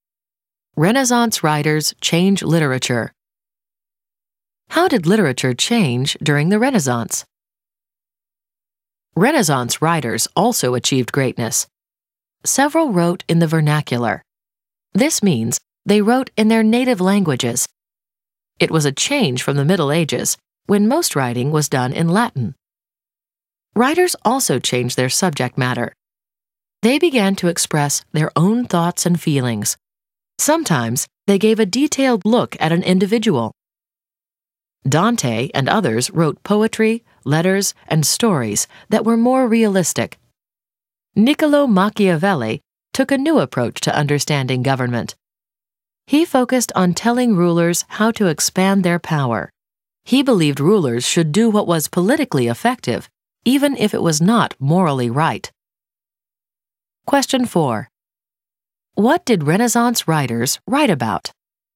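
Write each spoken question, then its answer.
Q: What did Renaissance writers write about?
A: Their own thoughts and feelings, detailed looks at individuals, realistic subjects, and government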